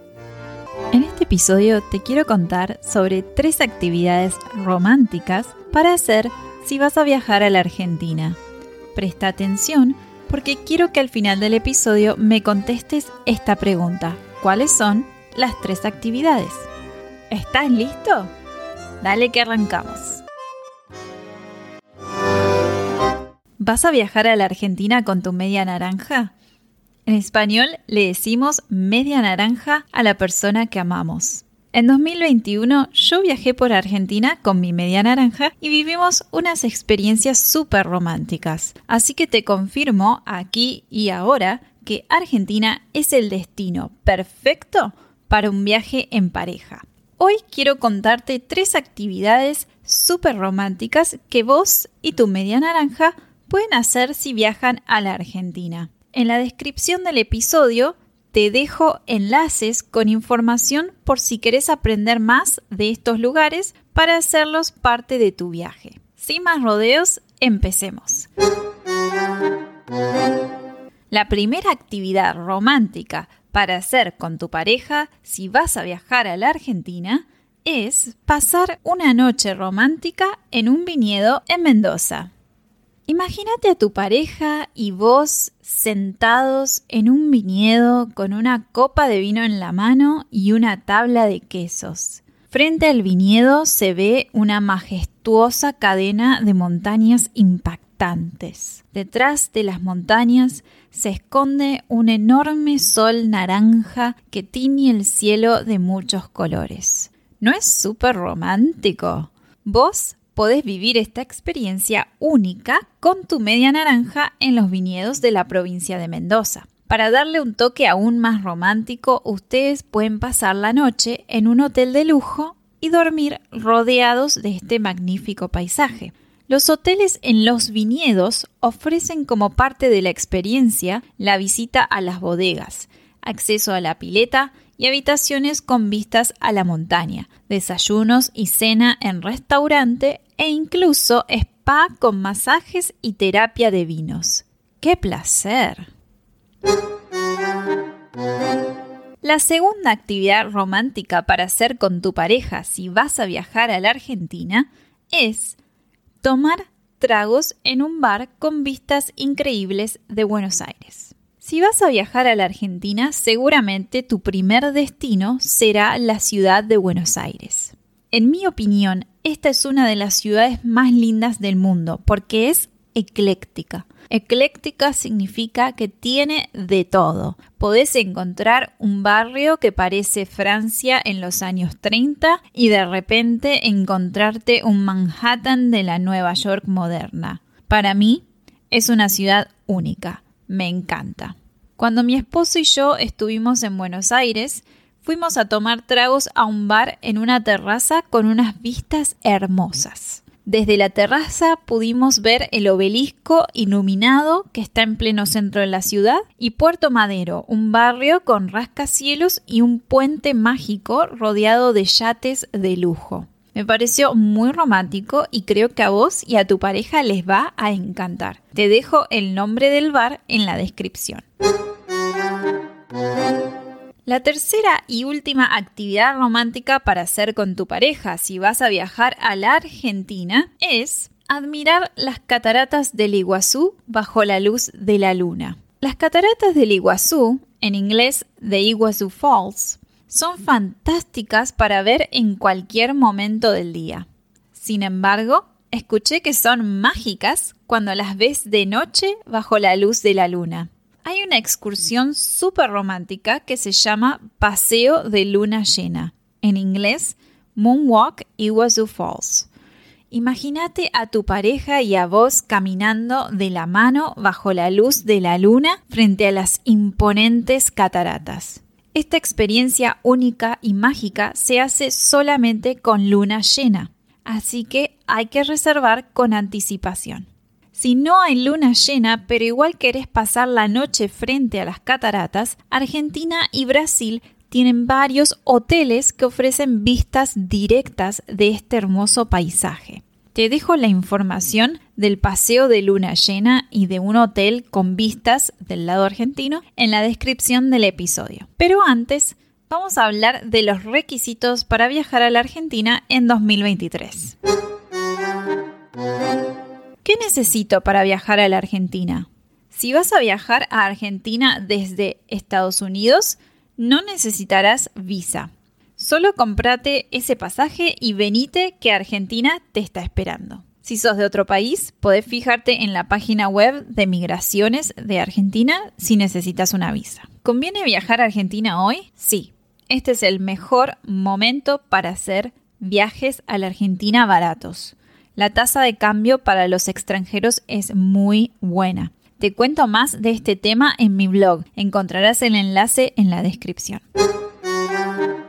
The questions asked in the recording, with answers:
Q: ¿Cuáles son las tres actividades?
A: las tres actividades románticas para hacer si vas a viajar a la Argentina son 1. Pasar una noche romántica en un viñedo en Mendoza. 2. Tomar unos tragos en un bar con vistas increíbles de Buenos Aires y 3. Admirar las cataratas del Iguazú bajo la luz de la luna.